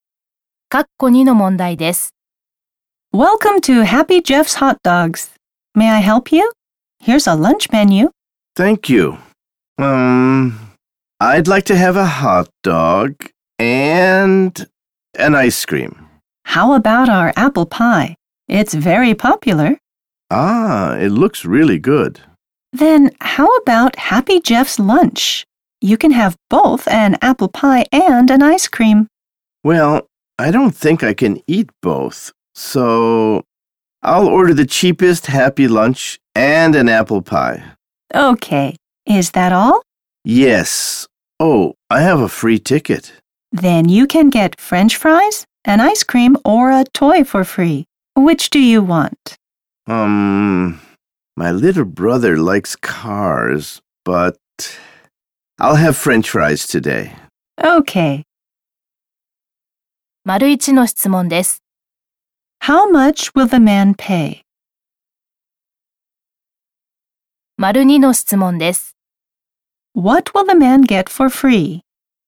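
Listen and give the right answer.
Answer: French fries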